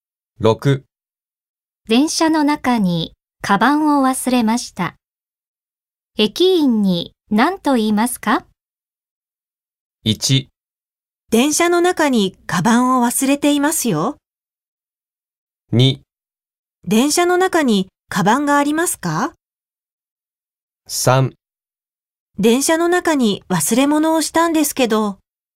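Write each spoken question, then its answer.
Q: 電車の中にカバンを忘れました。駅員に何と言いますか?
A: 3: 電車の中に忘れ物をしたんですけど。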